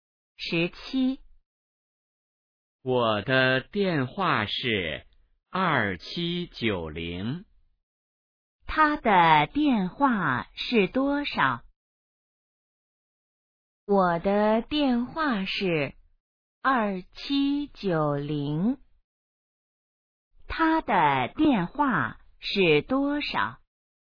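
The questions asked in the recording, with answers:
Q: 他的电话是多少?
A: 2790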